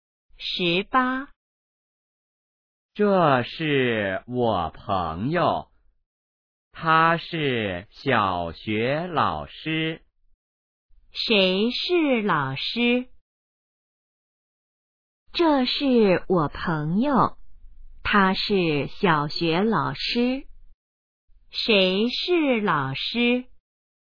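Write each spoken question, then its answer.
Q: 谁是老师?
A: 他的朋友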